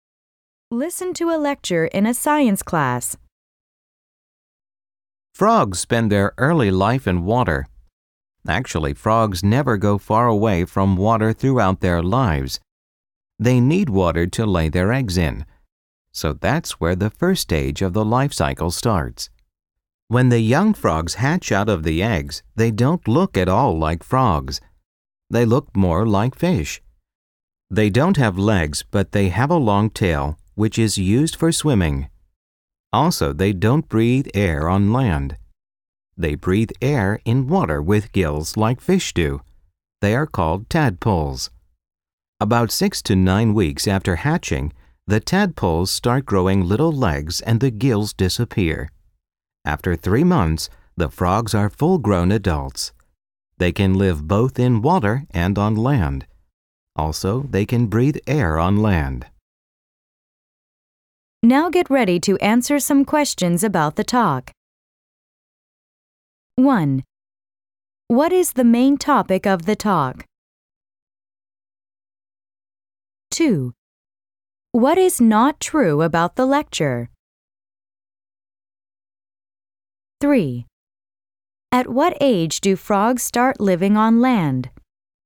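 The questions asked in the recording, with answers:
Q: What is the main topic of the talk?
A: The life cycle of frogs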